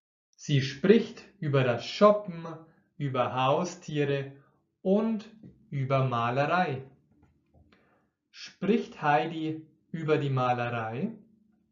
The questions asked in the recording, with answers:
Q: Spricht Heidi über die Malerei?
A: Ja, ganz genau. Sie spricht über die Malerei.